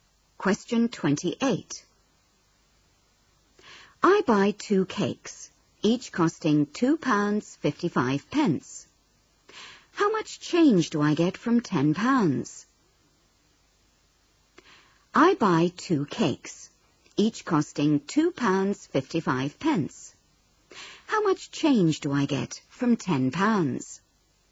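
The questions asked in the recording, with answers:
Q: How much change do I get from £10?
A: £4.90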